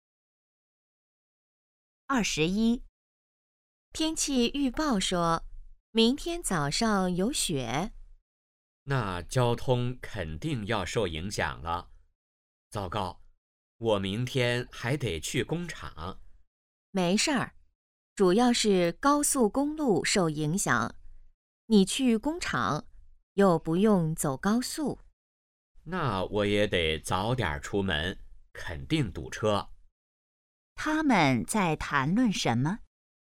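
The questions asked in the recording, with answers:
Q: 他们在谈论什么?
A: 下雪对交通的影响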